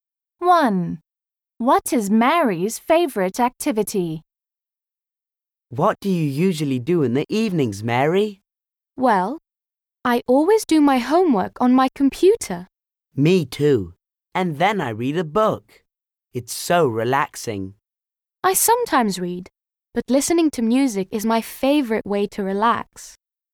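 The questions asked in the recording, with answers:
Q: What is Mary's favourite activity?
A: listening to music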